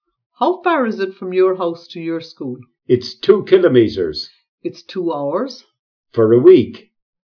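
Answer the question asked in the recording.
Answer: It's 2 kilometres.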